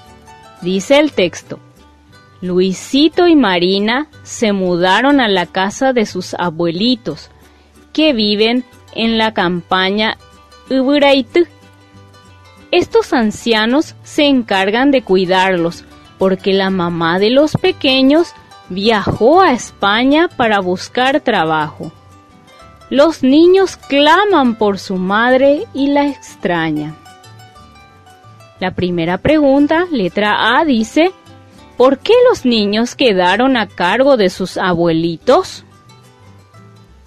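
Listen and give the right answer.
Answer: Porque su mamá viajó a España para buscar trabajo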